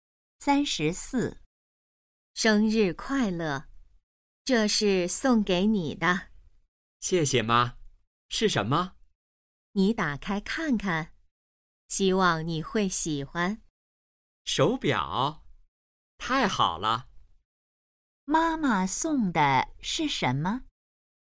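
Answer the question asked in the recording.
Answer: 手表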